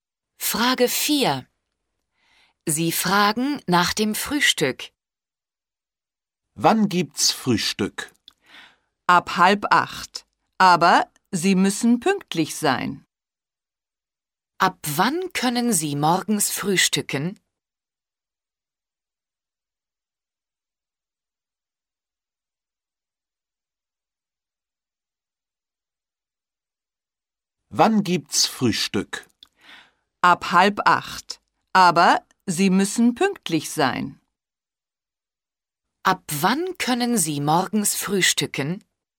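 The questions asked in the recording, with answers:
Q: Ab wann können Sie morgens frühstücken?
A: Ab 7:30 Uhr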